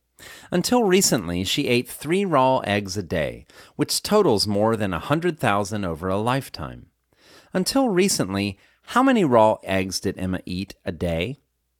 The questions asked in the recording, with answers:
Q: Until recently, how many raw eggs did Emma eat a day?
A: Until recently, Emma ate 3 raw eggs a day.